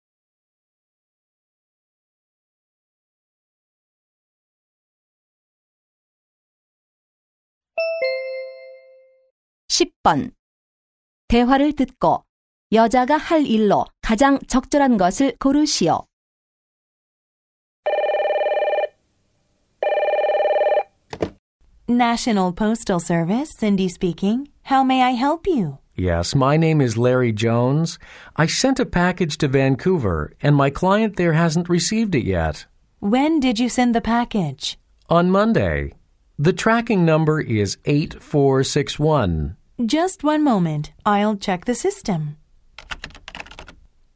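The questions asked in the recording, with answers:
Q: 대화를 듣고 여자가 할 일로 가장 적절한 것을 고르시오.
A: 테니스를 친 후 Mike의 자기소개서 교정해 주기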